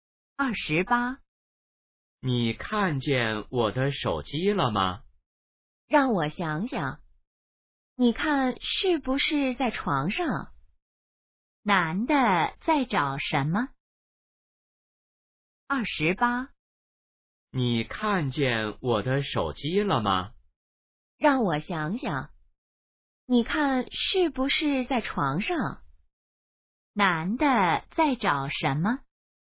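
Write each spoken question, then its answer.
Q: 男的在找什么?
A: 手机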